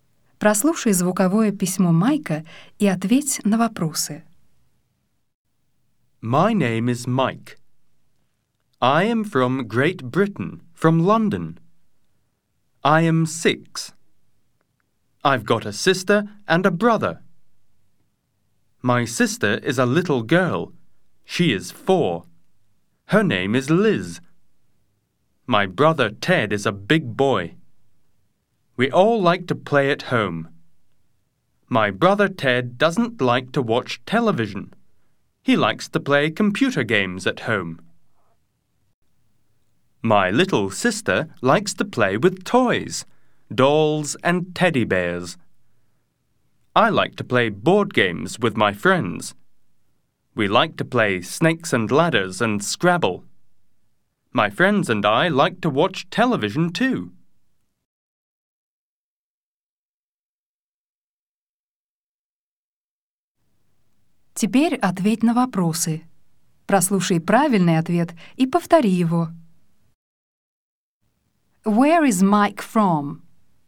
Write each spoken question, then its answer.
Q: Where is Mike from?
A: He is from Great Britain.